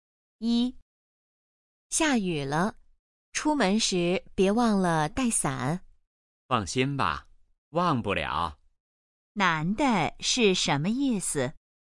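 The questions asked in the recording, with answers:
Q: 男的是什么意思?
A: 他不会忘记带伞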